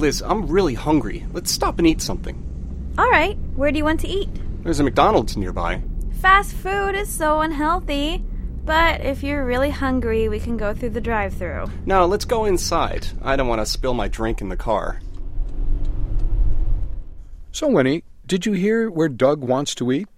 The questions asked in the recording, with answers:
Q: So Winnie, did you hear where Doug wants to eat?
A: 他想去 McDonald's, 就是麦当劳。